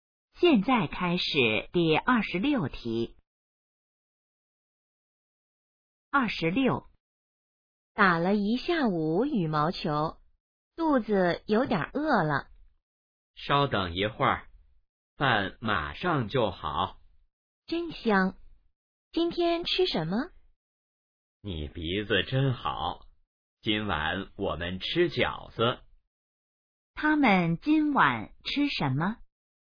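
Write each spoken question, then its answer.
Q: 他们今晚吃什么?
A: 饺子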